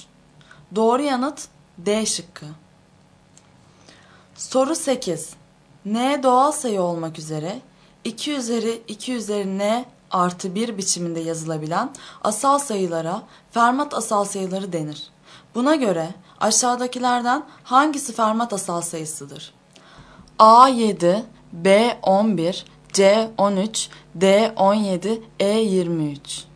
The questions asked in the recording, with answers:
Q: Buna göre aşağıdakilerden hangisi Fermat asal sayısıdır?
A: Doğru yanıt D şıkkı.